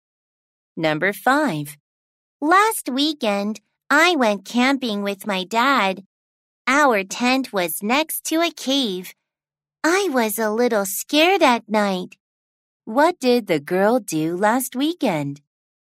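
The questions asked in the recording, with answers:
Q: What did the girl do last weekend?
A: She went camping with her dad.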